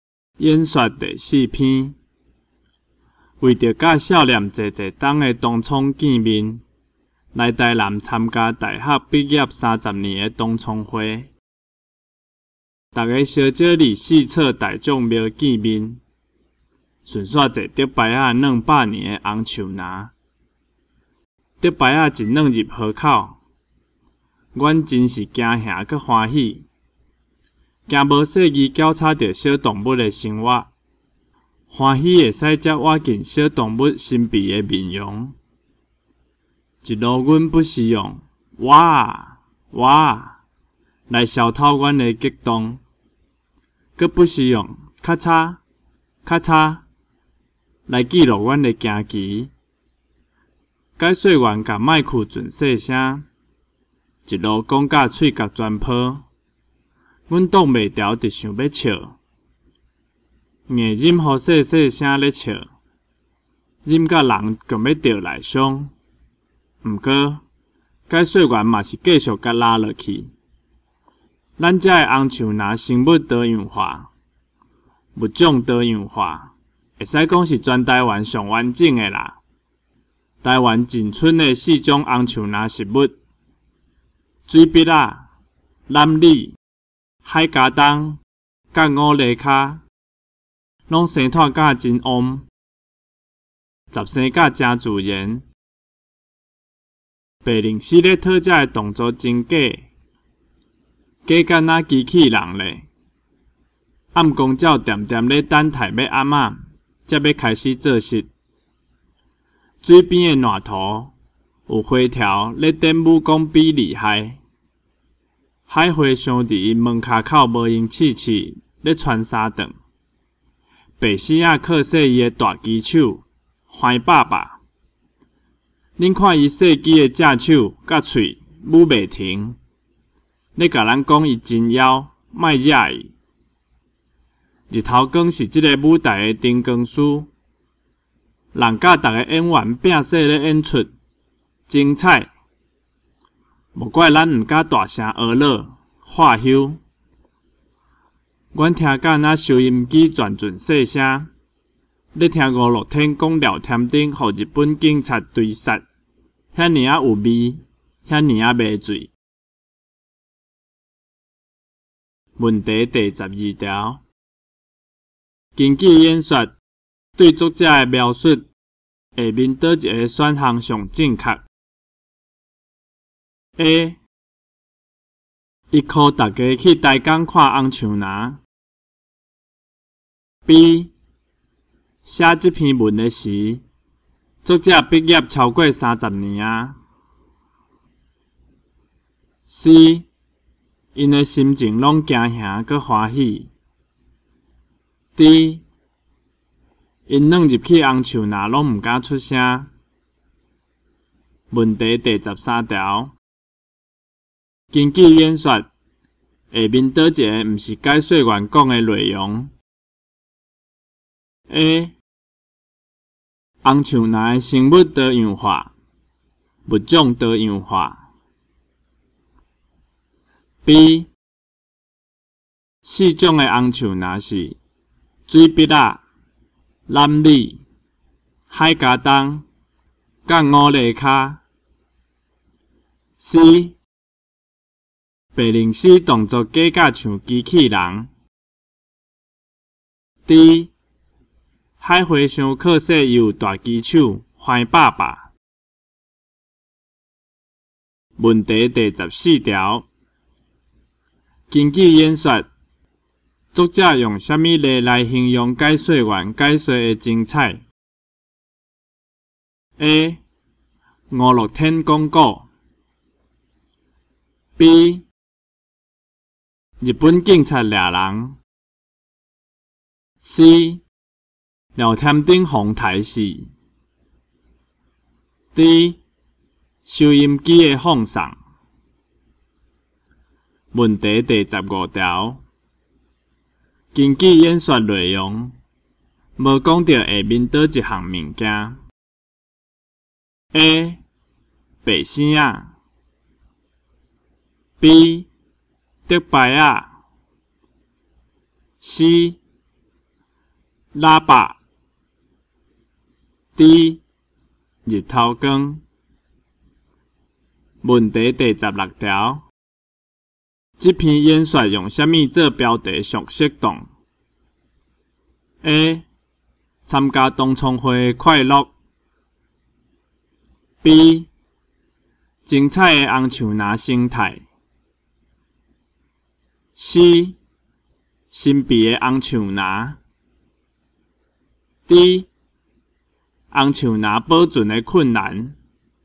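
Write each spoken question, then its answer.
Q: 根据演说,对作者的描述,下面倒一个选项上正确?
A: C: 因的心情拢惊吓,搁欢喜。

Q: 这篇演说用什么做标题上适当?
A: B: 精彩的红树拿心态。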